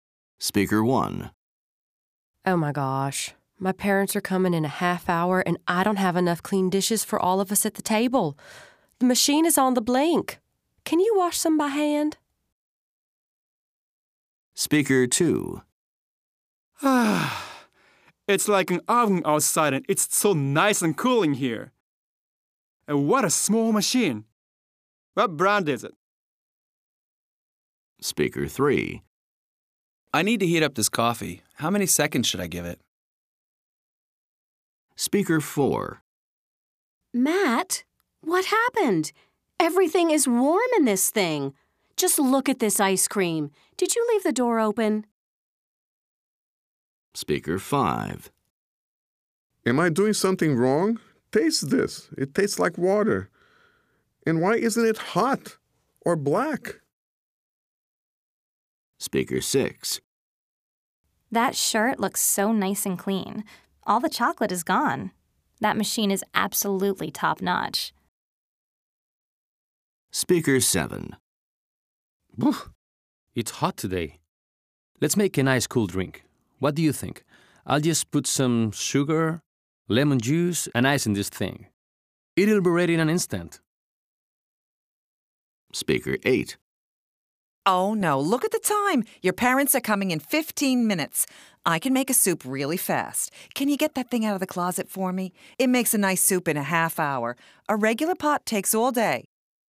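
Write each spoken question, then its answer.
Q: Listen and write the name of the appliance.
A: dishwasher

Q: Listen and write the name of the appliance.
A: air conditioner

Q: Listen and write the name of the appliance.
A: microwave

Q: Listen and write the name of the appliance.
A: refrigerator / freezer

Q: Listen and write the name of the appliance.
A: coffee maker

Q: Listen and write the name of the appliance.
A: washing machine

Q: Listen and write the name of the appliance.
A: blender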